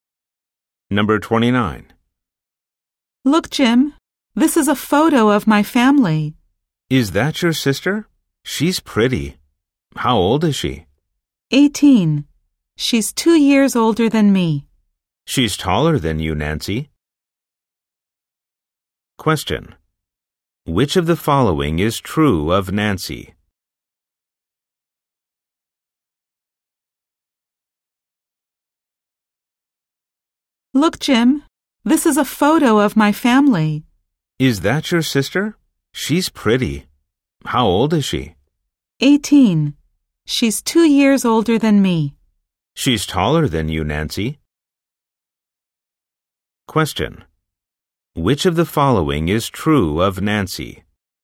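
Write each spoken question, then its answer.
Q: Which of the following is true of Nancy?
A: She is 16 and shorter than her sister.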